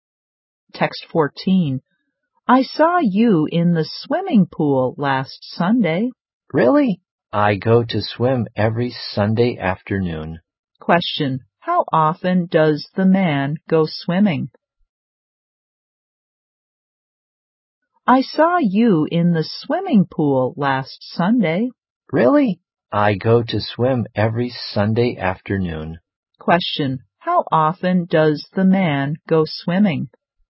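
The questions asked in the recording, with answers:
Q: How often does the man go swimming?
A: Every Sunday afternoon (once a week)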